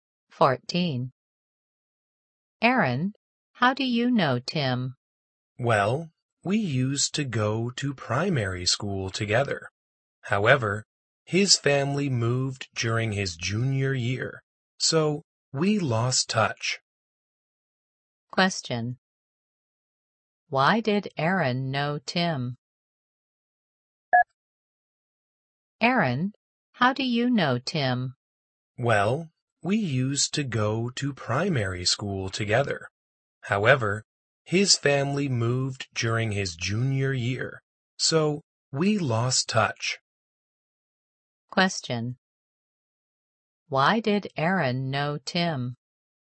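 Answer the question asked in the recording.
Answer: They used to go to primary school together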